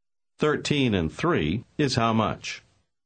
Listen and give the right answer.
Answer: 16.